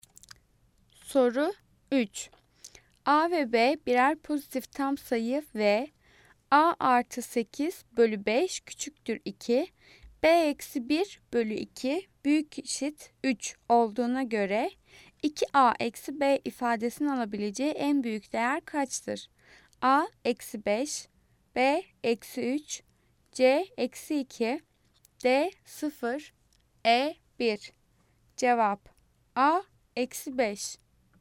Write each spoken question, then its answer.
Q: A ve B birer pozitif tam sayı ve A artı 8 bölü 5 küçüktür 2, B eksi 1 bölü 2 büyük eşit 3 olduğuna göre 2A eksi B ifadesinin alabileceği en büyük değer kaçtır?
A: Cevap A eksi 5.